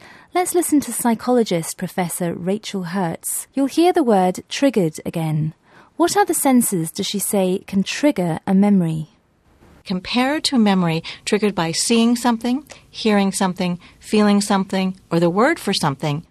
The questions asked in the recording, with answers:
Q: What other senses does she say can trigger a memory?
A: She mentioned that memories can be triggered by seeing, hearing, feeling, or hearing the word for something.